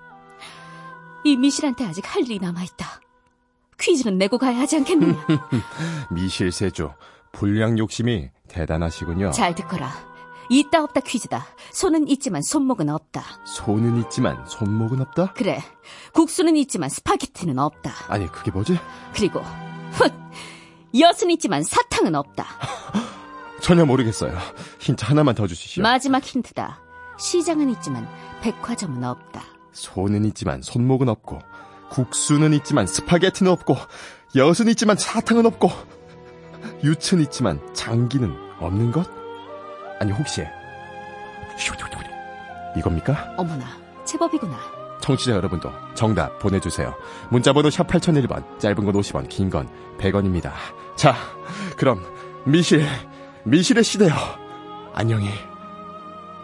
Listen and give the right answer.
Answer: 정답은 가락입니다.